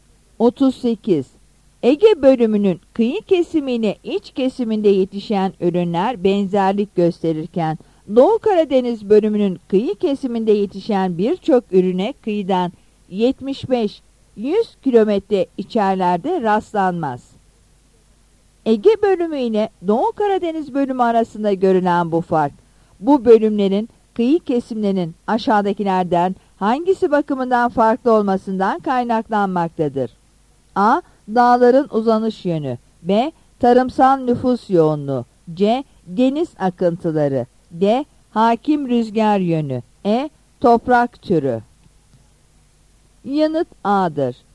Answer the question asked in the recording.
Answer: Yanıt A'dır.